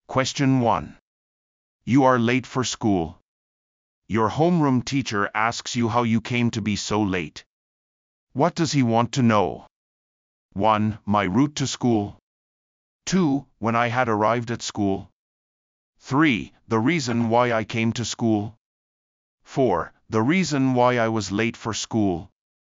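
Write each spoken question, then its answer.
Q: What does he want to know?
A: 4: The reason why I was late for school.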